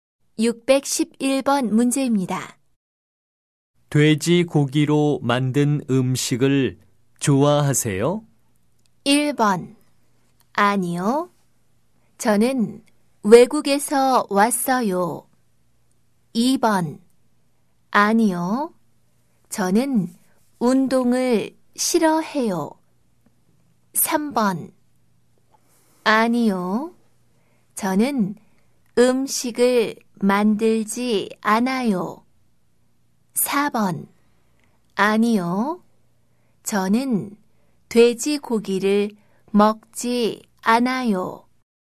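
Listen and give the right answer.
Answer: 4: 아니요. 저는 돼지고기를 먹지 않아요.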